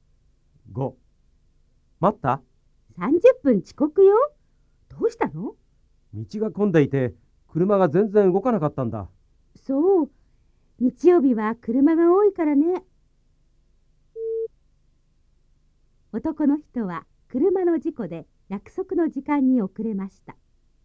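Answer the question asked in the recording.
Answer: ×(道が混んでいたから)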